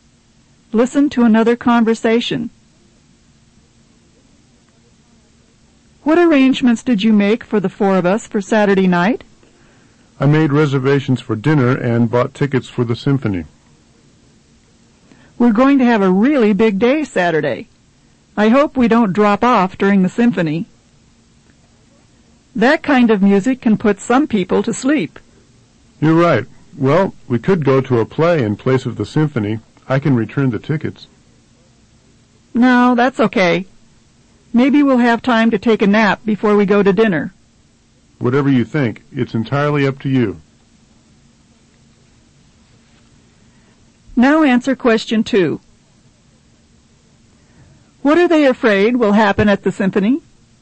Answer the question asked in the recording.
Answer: they're afraid they'll go to sleep during the symphony.